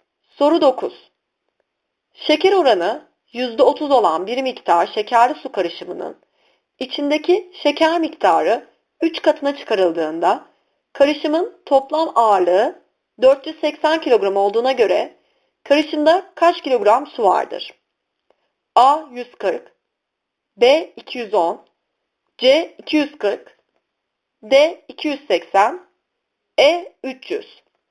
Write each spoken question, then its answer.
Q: Şeker oranı %30 olan bir miktar şekerli su karışımının içindeki şeker miktarı 3 katına çıkarıldığında karışımın toplam ağırlığı 480 kilogram olduğuna göre karışımda kaç kilogram su vardır?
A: Doğru yanıt B 210.